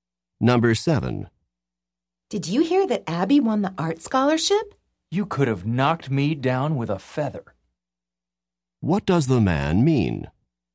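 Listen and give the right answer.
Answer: He was very surprised.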